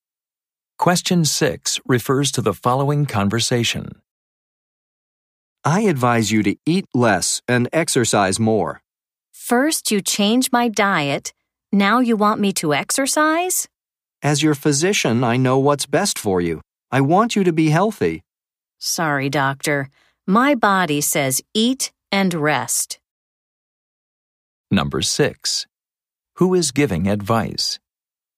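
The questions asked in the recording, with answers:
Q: Who is giving advice?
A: A doctor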